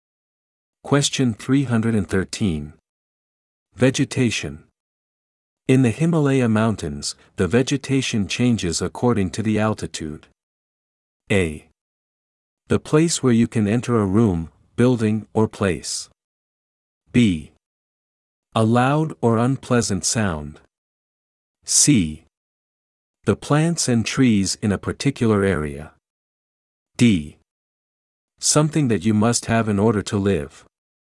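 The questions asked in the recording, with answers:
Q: Vegetation.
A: C: The plants and trees in a particular area.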